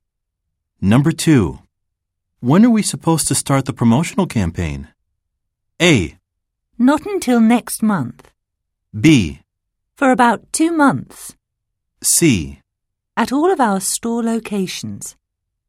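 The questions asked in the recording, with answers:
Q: When are we supposed to start the promotional campaign?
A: A: Not until next month.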